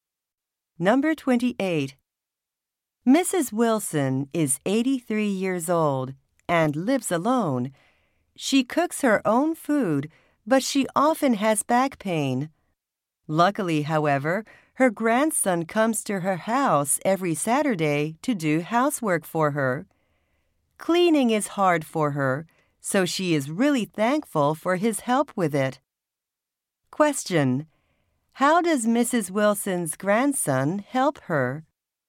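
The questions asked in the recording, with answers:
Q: How does Mrs. Wilson's grandson help her?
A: He does housework such as cleaning for her every Saturday.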